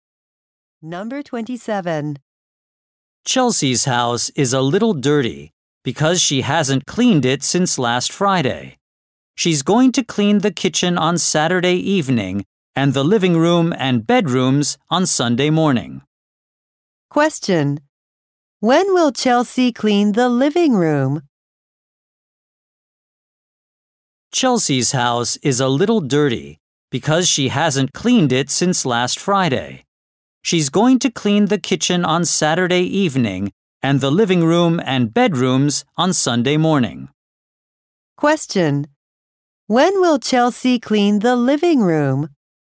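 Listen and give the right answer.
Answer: On Sunday morning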